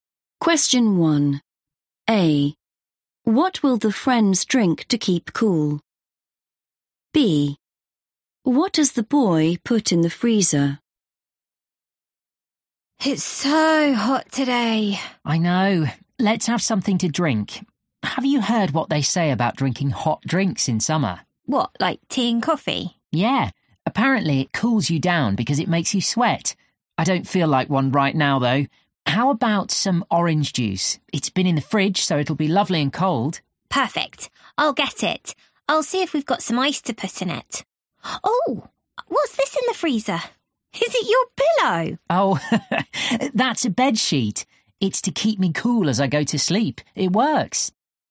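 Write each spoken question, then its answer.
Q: What will the friends drink to keep cool?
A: orange juice

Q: What does the boy put in the freezer?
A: a bed sheet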